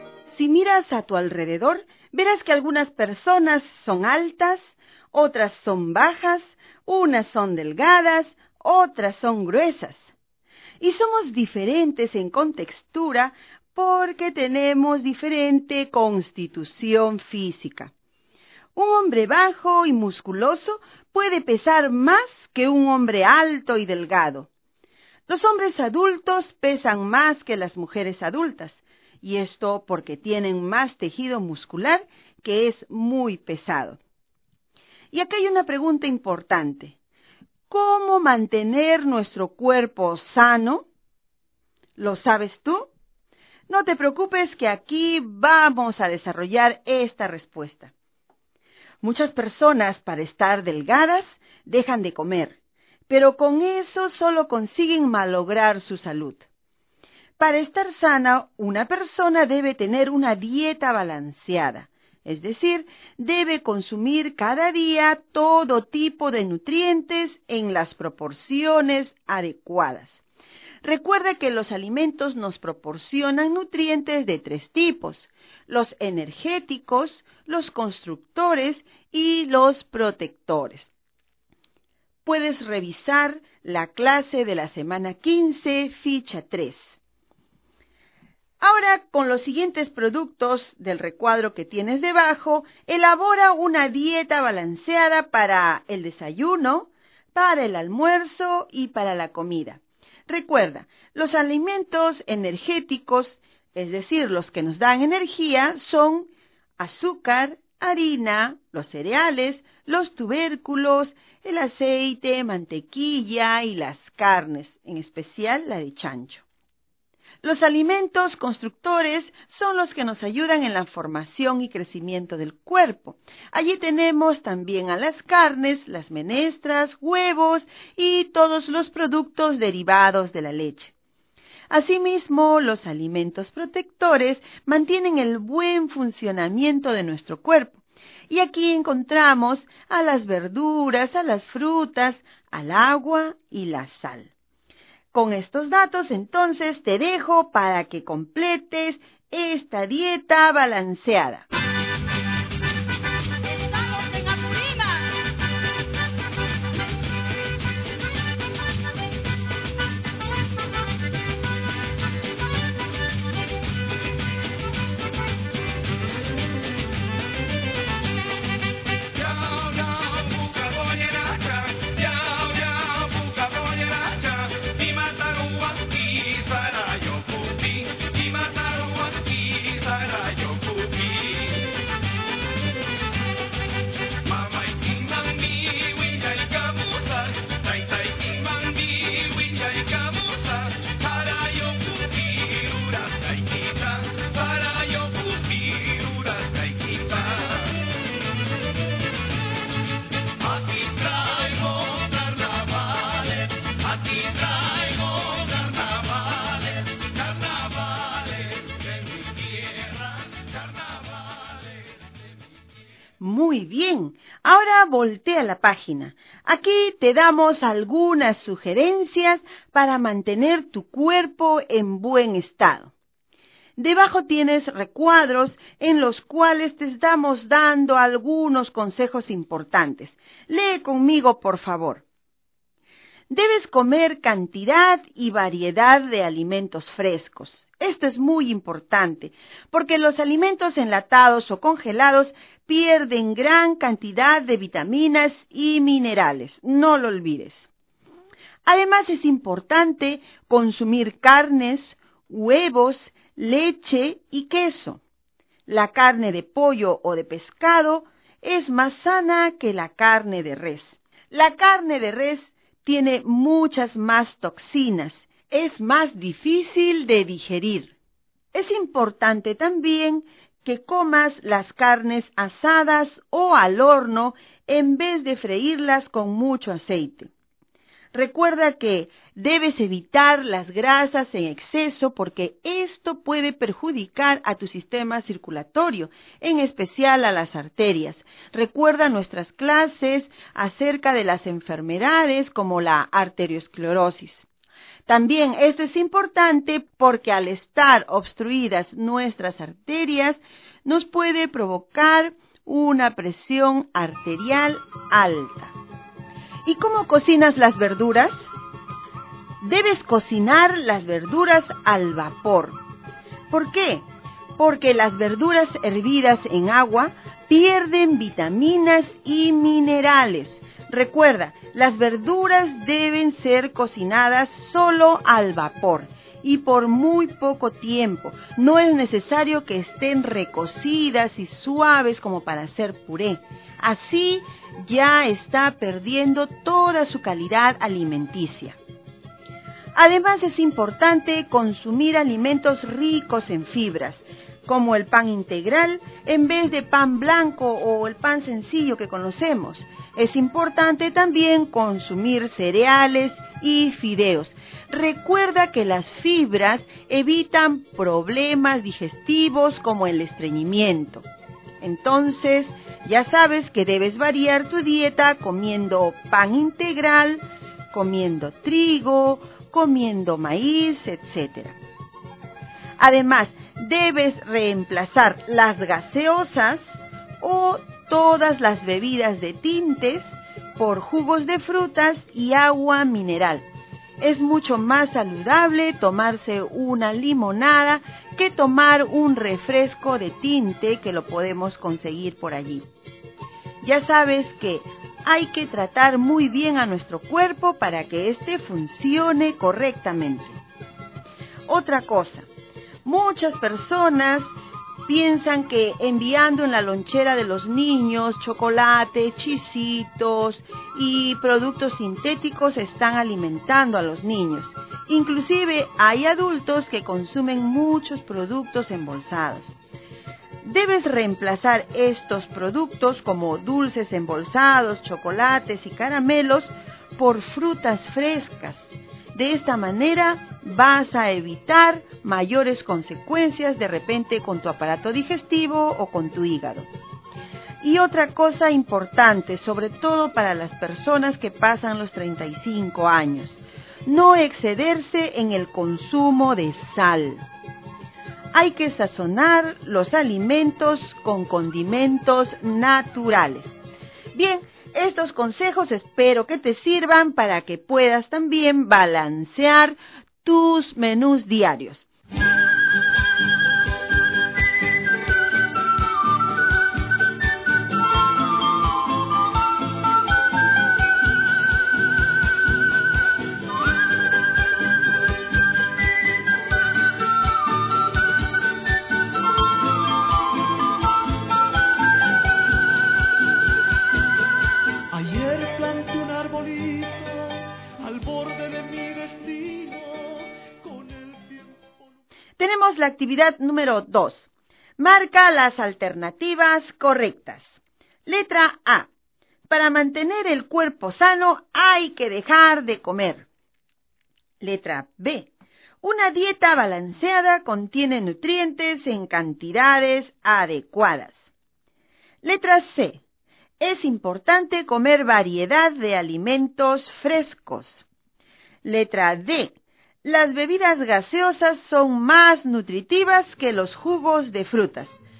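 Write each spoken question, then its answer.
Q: Marca las alternativas correctas. Letra A. Para mantener el cuerpo sano hay que dejar de comer. Letra B. Una dieta balanceada contiene nutrientes en cantidades adecuadas. Letra C. es importante comer variedad de alimentos frescos. Letra D. Las bebidas gaseosas son más nutritivas que los jugos de frutas.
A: B: Una dieta balanceada contiene nutrientes en cantidades adecuadas; C: es importante comer variedad de alimentos frescos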